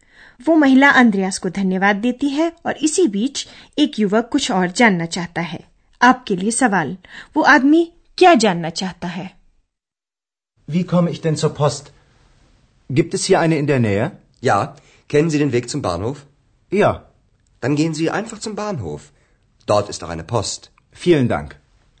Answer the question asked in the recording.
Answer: वह युवक जानना चाहता है कि क्या hotel Europe के नजदीक कोई post office है